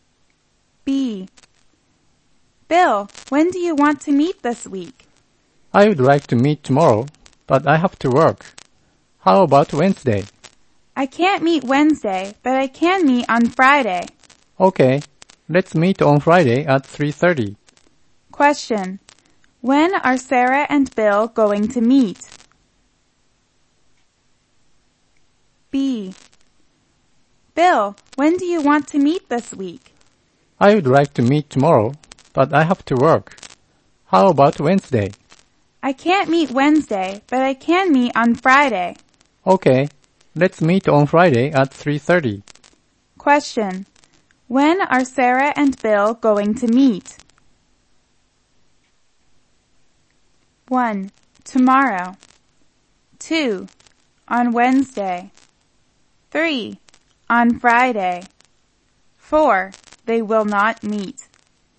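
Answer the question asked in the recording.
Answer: 3: On Friday.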